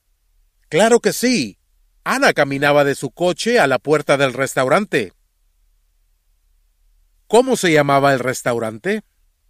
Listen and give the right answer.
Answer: El restaurante se llamaba El Capitán Buenavida.